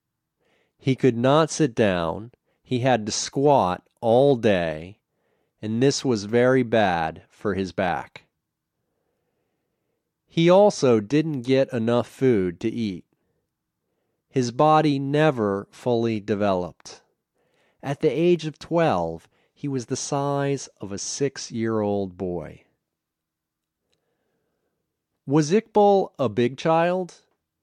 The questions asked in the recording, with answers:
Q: Was Iqbal a big child?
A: No, he was very small.